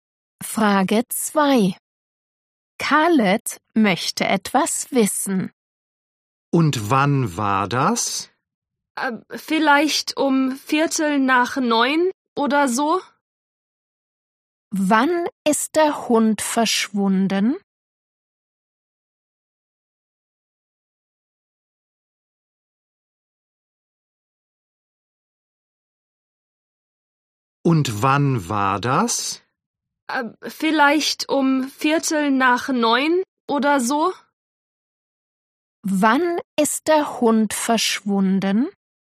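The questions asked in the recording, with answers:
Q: Wann ist der Hund verschwunden?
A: um 8:45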